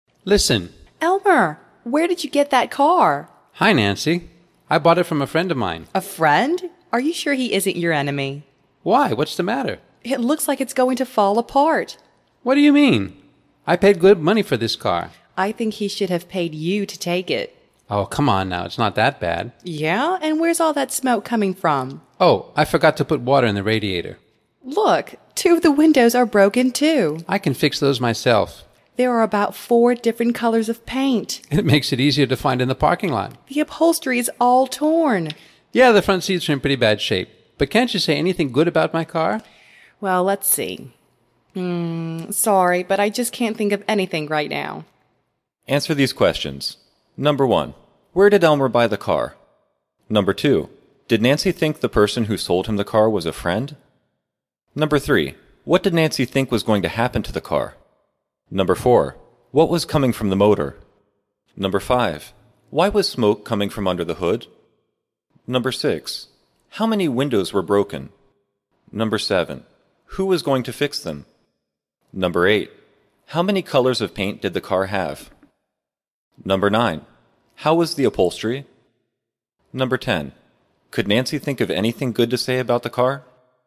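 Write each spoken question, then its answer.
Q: where did Elmer buy the car?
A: From a friend of his

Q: did Nancy think the person who sold him the car was a friend?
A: No, she thought he was his enemy

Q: what did Nancy think was going to happen to the car?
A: It was going to fall apart

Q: what was coming from the motor?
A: Smoke

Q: why was smoke coming from under the hood?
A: He forgot to put water in the radiator

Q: how many windows were broken?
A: Two

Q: who was going to fix them?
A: Elmer himself

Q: how many colors of paint did the car have?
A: About four

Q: how was the upholstery?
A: All torn

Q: could Nancy think of anything good to say about the car?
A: No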